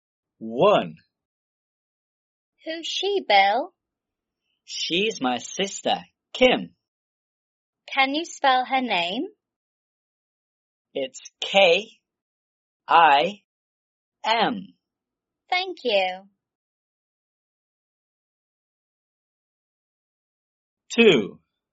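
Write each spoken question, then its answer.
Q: Can you spell her name?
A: K-I-M (Kim)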